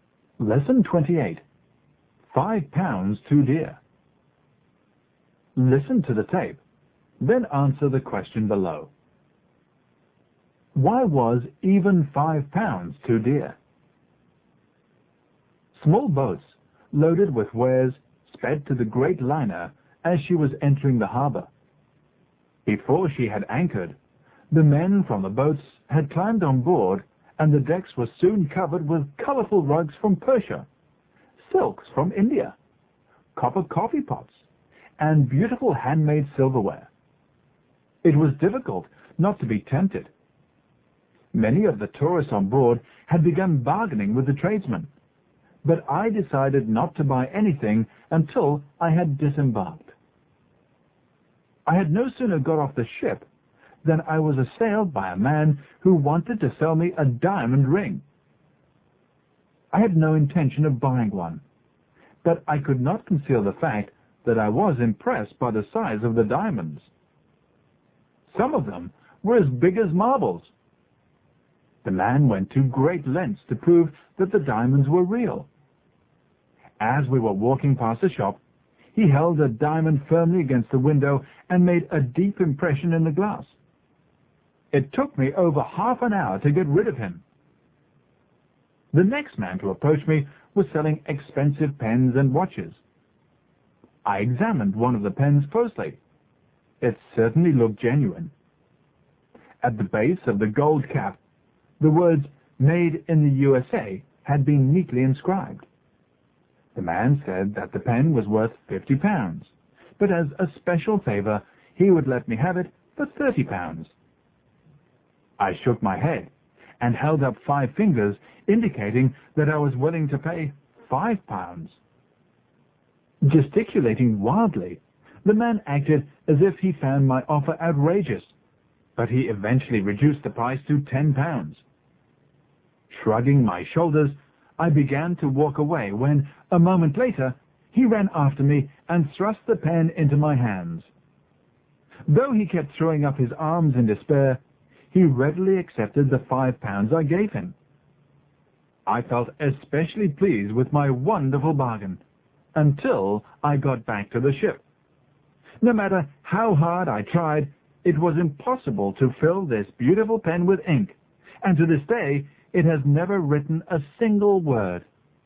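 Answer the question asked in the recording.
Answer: Because the pen was fake and could never be filled with ink or write a word.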